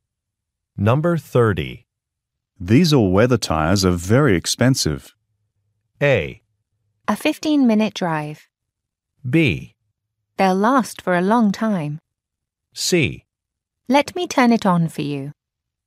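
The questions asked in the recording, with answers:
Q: These all-weather tires are very expensive.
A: B: They'll last for a long time.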